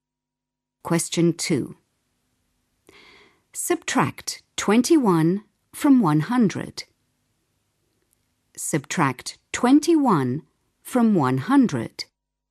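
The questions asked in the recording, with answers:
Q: Subtract 21 from 100.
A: 79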